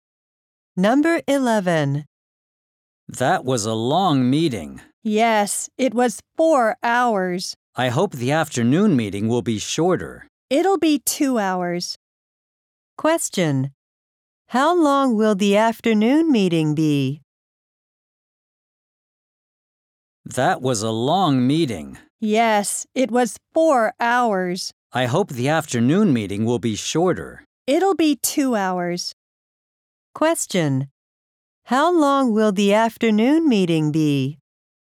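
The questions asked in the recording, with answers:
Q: How long will the afternoon meeting be?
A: 2 hours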